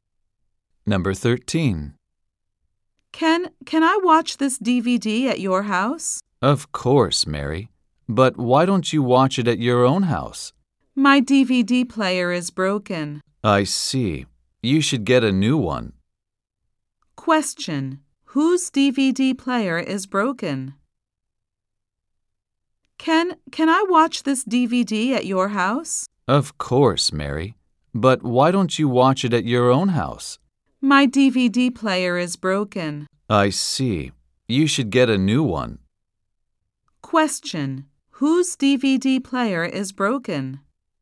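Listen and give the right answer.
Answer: Mary's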